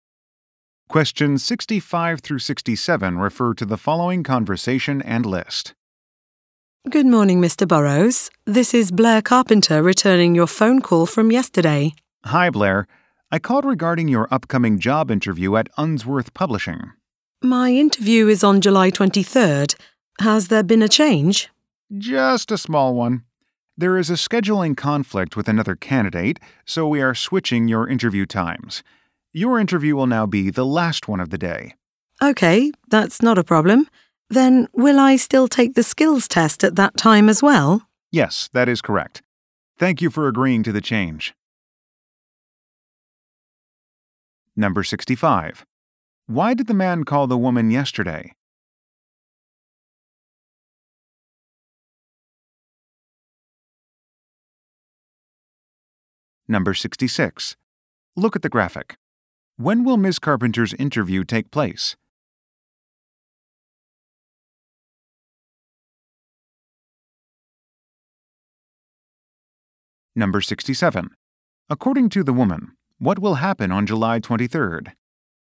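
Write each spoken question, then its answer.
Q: Why did the man call the woman yesterday?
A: To change her interview time

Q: According to the woman, what will happen on July 23rd?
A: Her job interview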